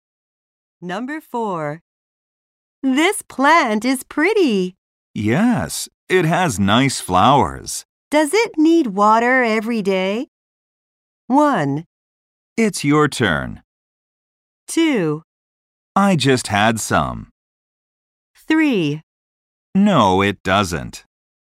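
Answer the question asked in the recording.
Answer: 3: No, it doesn't.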